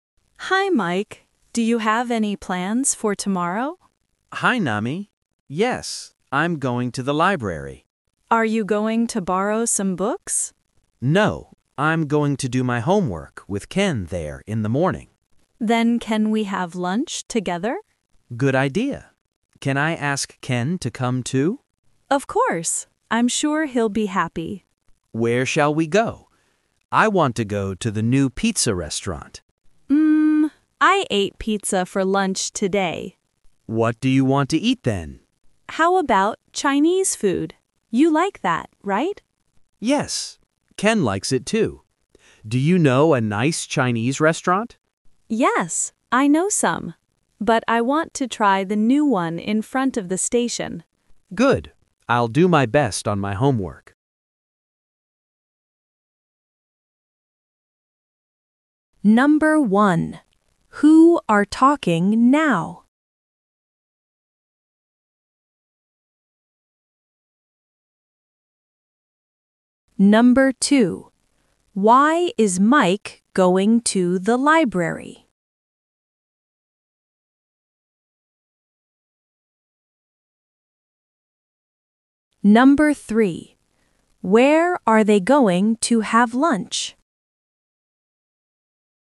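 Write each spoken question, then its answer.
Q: Who are talking now?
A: Mike and Nami

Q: Why is Mike going to the library?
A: To do his homework with Ken

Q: Where are they going to have lunch?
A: At the new Chinese restaurant in front of the station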